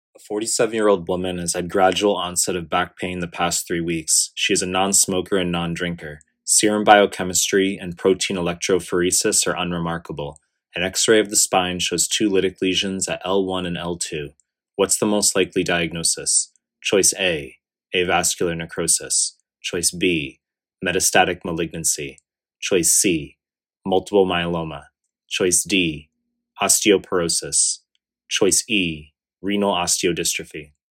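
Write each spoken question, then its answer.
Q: What's the most likely diagnosis?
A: B: metastatic malignancy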